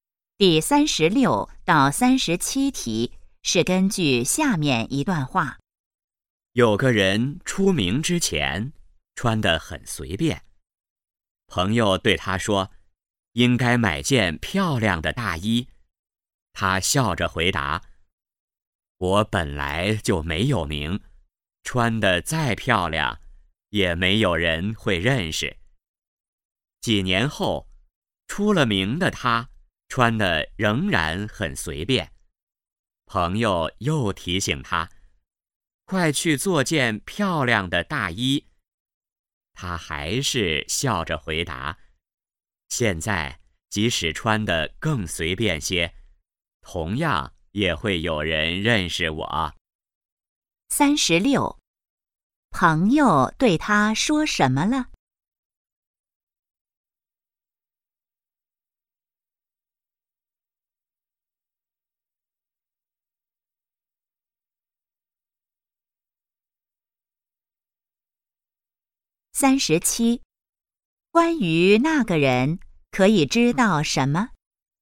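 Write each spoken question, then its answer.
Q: 朋友对他说什么了?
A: 应该买件漂亮的大衣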